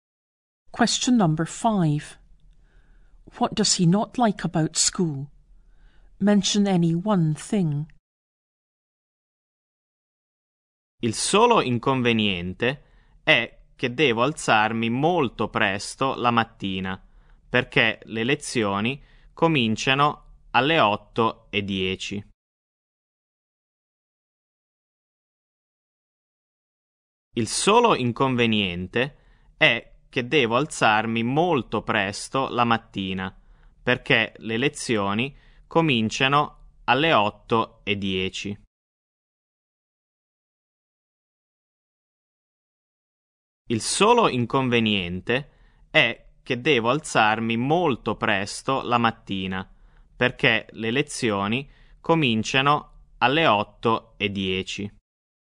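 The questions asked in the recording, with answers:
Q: What does he not like about school?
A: He has to get up very early; lessons start at 8:10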